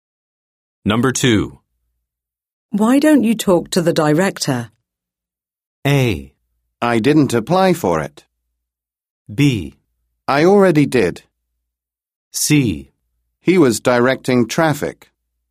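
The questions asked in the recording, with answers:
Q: Why don't you talk to the director?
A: B: I already did.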